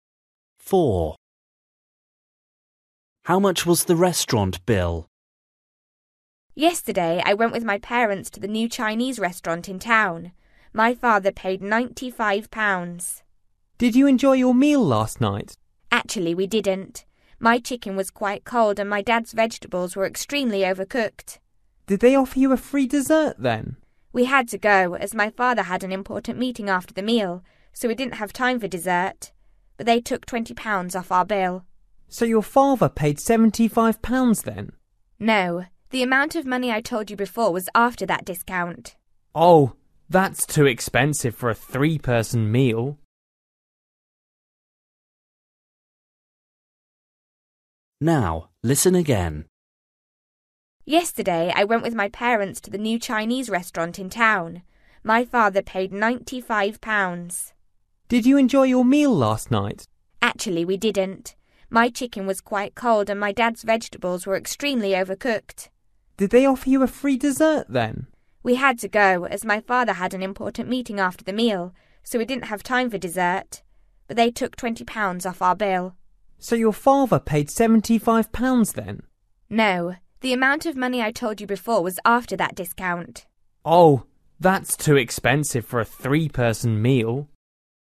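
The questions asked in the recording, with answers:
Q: How much was the restaurant bill?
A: £95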